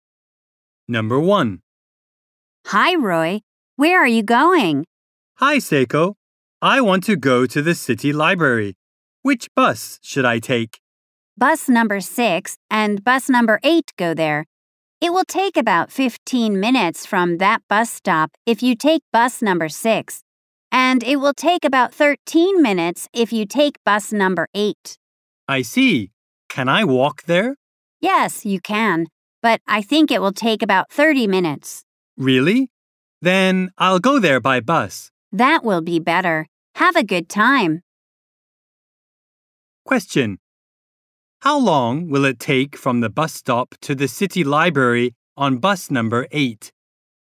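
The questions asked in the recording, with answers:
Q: How long will it take from the bus stop to the city library on bus number 8?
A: About 13 minutes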